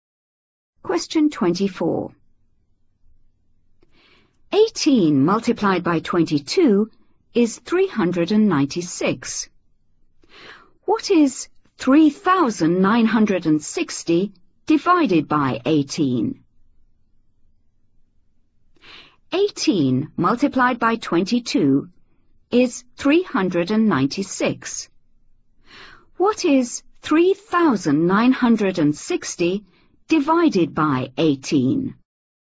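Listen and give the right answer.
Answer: 220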